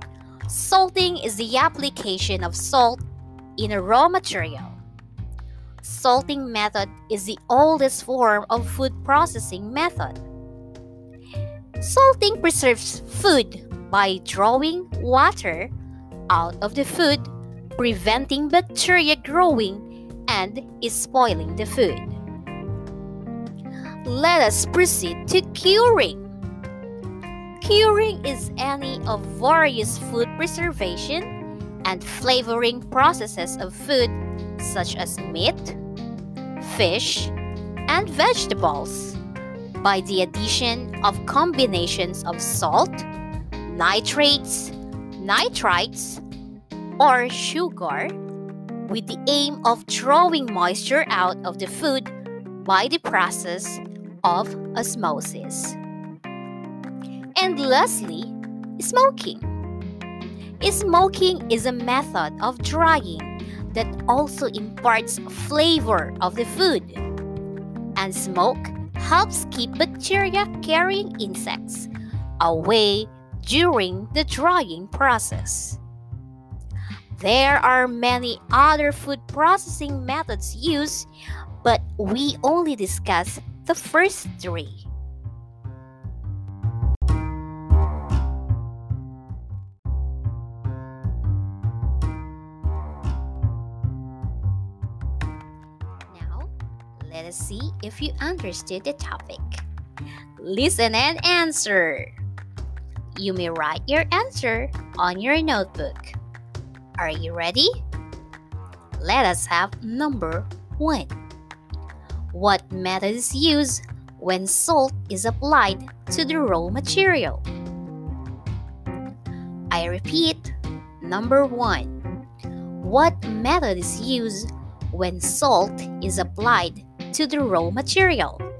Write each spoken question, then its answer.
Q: What method is used when salt is applied to the raw material?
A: Yes, salting is the answer.